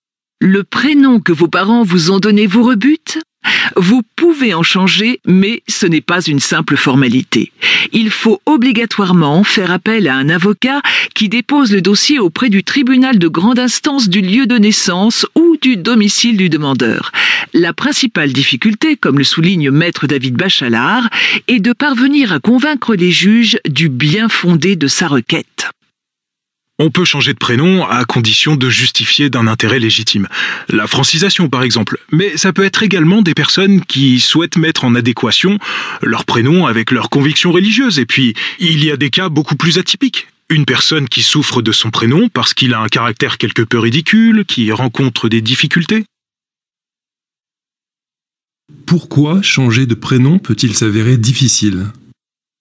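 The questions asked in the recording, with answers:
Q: Pourquoi changer de prénom peut-il s'avérer difficile ?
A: Il faut convaincre les juges du bien-fondé de sa requête (justifier d'un intérêt légitime).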